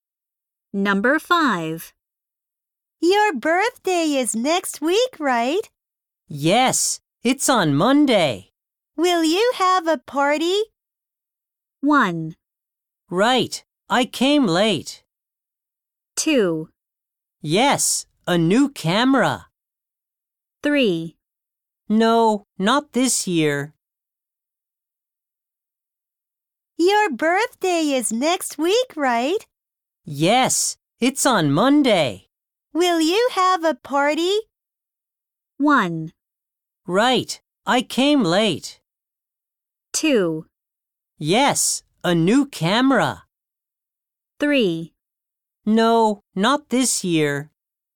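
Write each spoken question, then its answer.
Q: Will you have a party?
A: 3: No, not this year.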